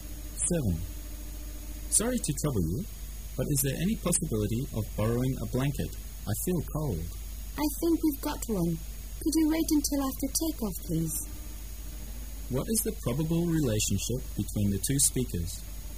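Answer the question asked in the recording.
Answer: Passenger and flight attendant

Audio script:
[解析] M: Sorry to trouble you. But is there any possibility of borrowing a blanket? I feel cold. W: I think we've got one. Could you wait until after take-off please? Q: What is the probable relationship between the two speakers?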